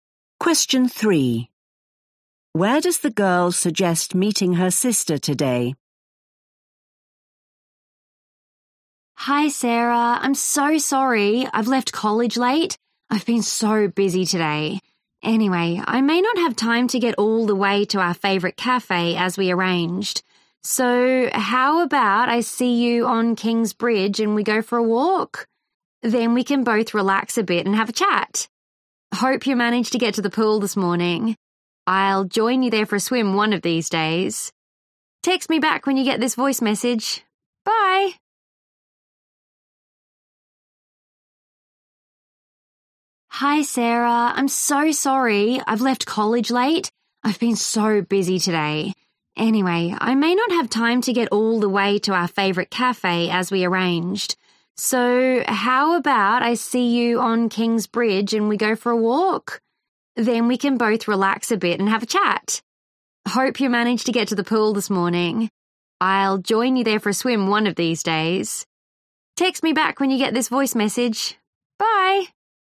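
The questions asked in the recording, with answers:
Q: Where does the girl suggest meeting her sister today?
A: on King's Bridge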